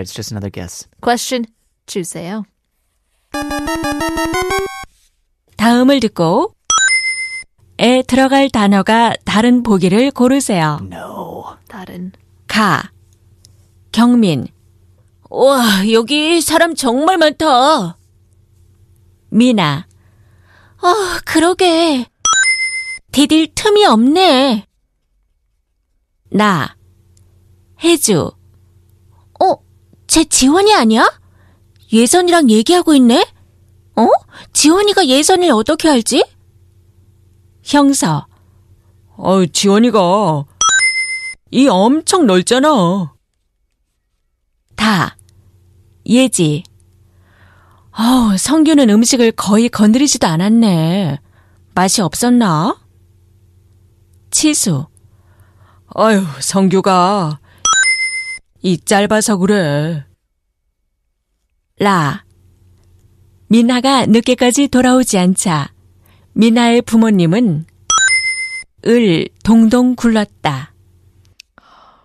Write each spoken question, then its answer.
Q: 다음을 듣고 에 들어갈 단어가 다른 보기를 고르세요.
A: So that means you are correct in choosing 가, or 다, excuse me.